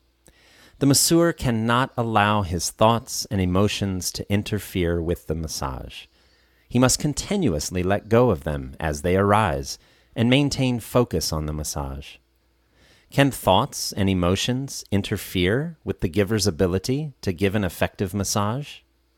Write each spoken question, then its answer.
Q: Can thoughts and emotions interfere with the giver's ability to give an effective massage?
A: Yes, the giver's thoughts and emotions can interfere with the massage.